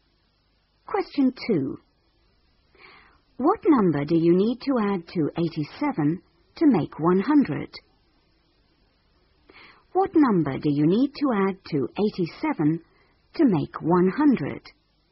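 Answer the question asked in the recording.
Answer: 13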